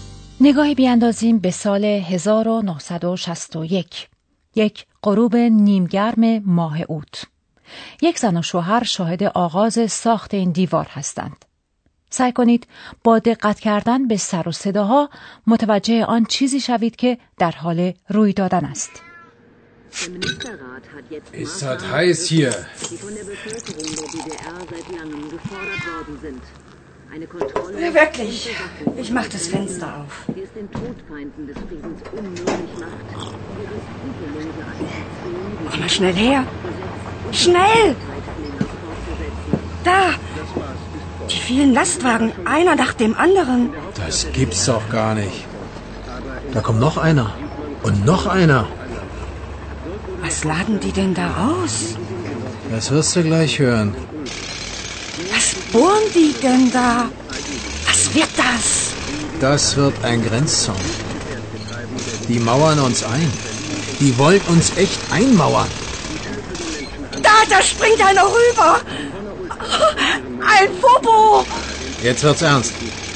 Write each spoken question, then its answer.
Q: سعی کنید با دقت کردن به سر و صداها متوجه آن چیزی شوید که در حال روی دادن است.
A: آنها در حال ساختن یک گرنززاون یعنی یک حصار مرزی هستند.